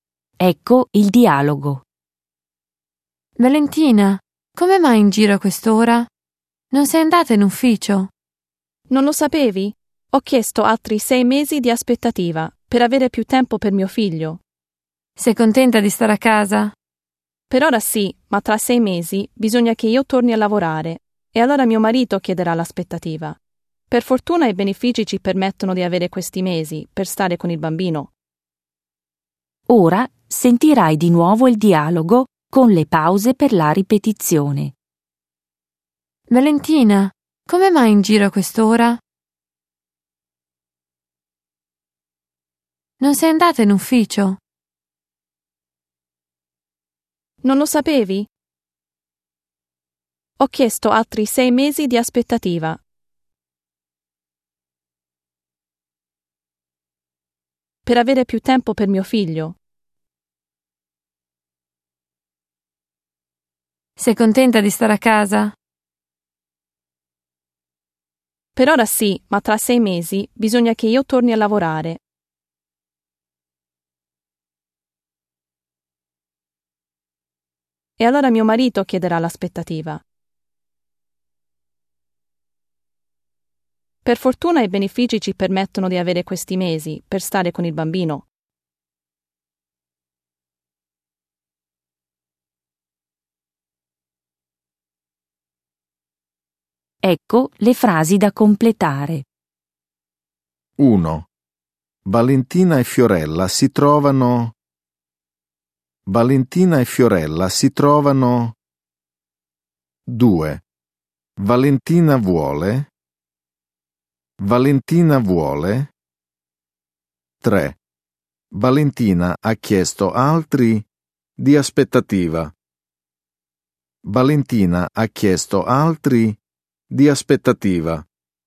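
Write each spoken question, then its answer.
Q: Valentina ha chiesto altri di aspettativa.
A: 6 mesi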